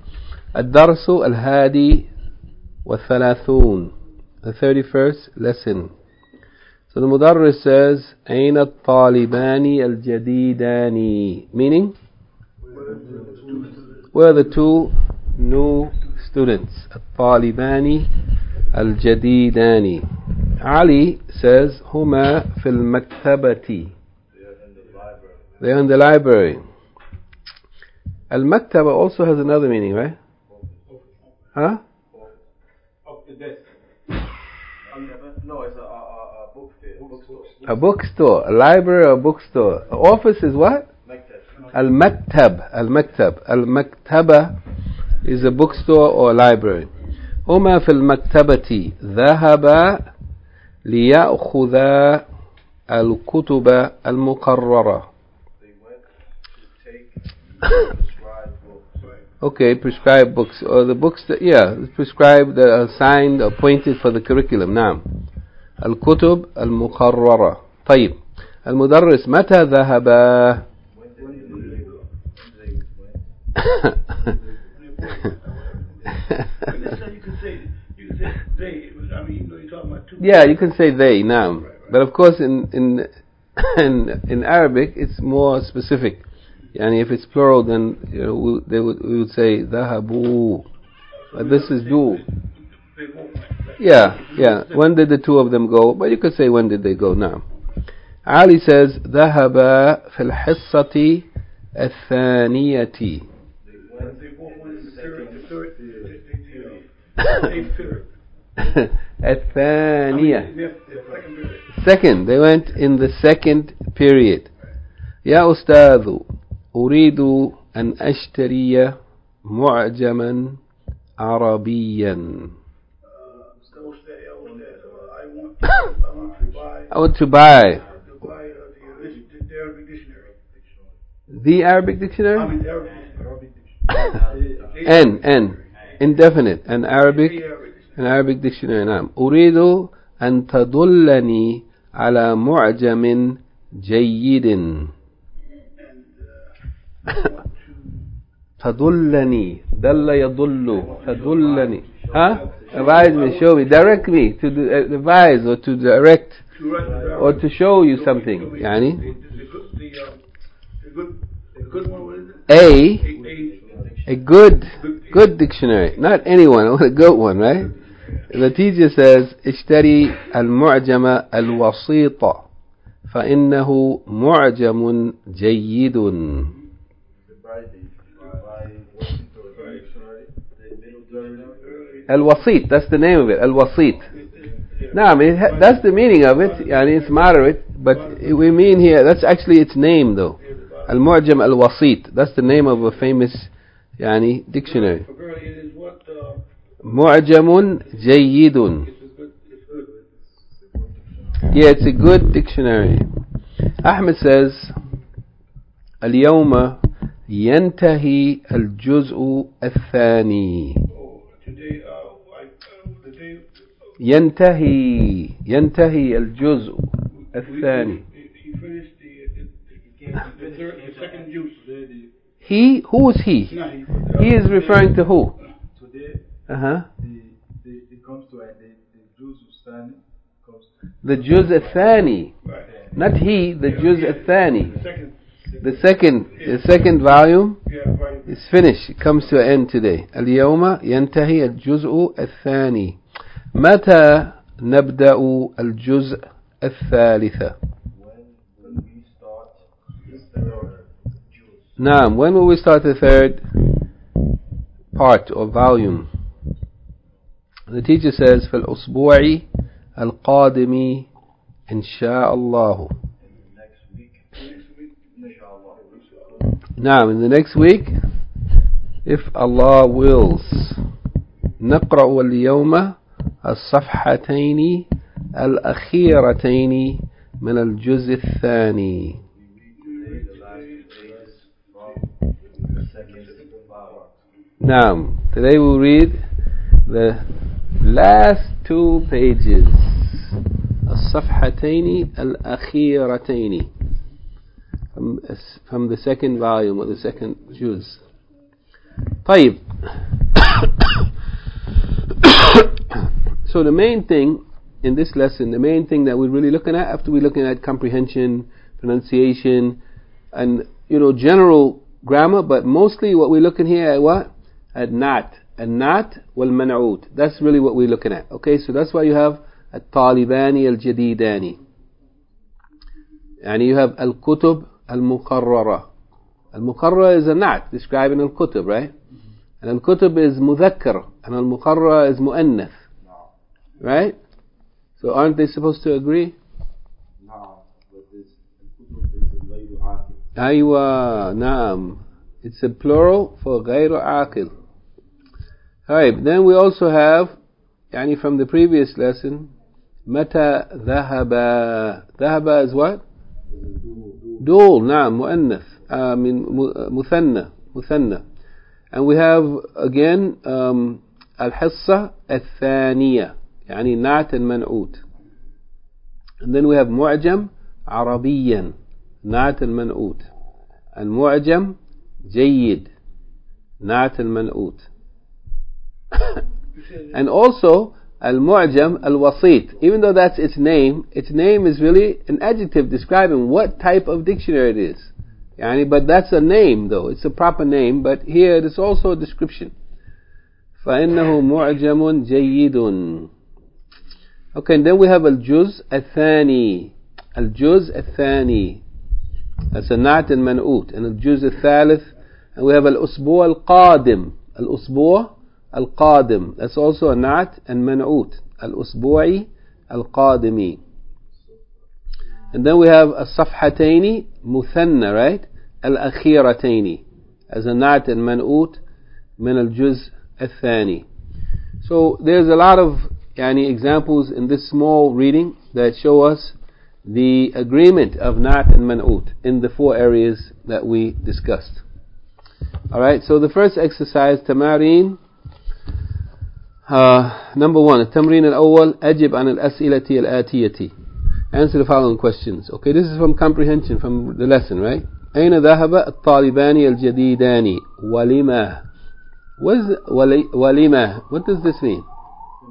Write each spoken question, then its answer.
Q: Aina dhahaba al-talibani al-jadidani, walima.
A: مكتبتي. لِيَأْخُذَ الْكُتُبَ الْمُقَرَّرَةَ.